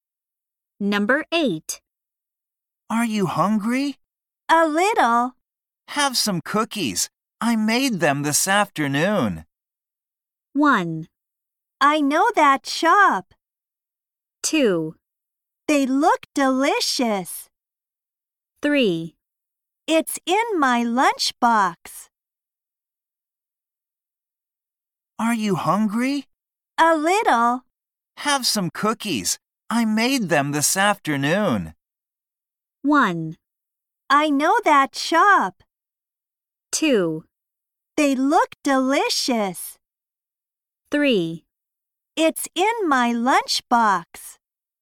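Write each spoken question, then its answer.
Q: Have some cookies. I made them this afternoon.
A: 2: They look delicious.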